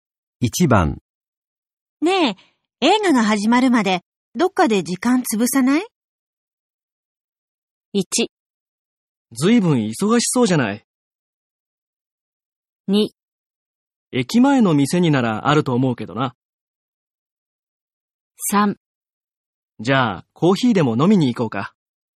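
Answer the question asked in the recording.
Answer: 3: じゃあコーヒーでも飲みに行こうか。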